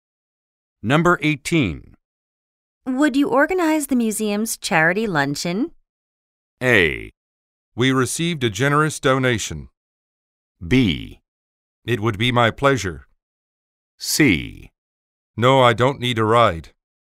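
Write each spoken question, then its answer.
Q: Would you organize the museum's charity luncheon?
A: B: It would be my pleasure.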